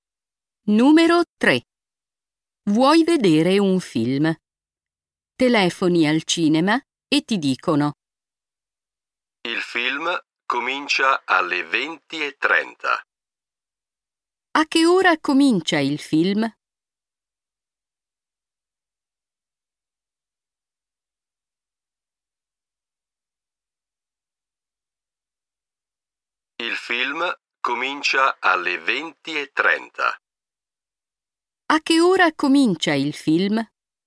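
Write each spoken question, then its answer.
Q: A che ora comincia il film?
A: Alle 20:30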